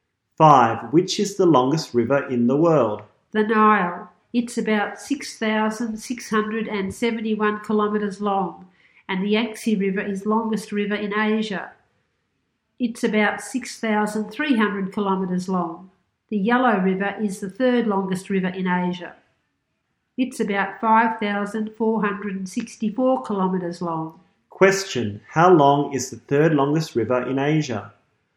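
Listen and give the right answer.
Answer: About 5,464 kilometers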